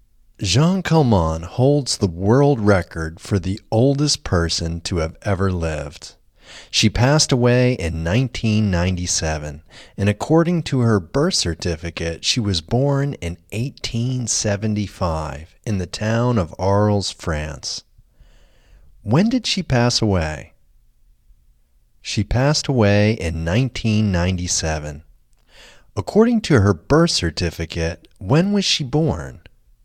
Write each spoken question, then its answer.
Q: According to her birth certificate, when was she born?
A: According to her birth certificate, she was born in 1875.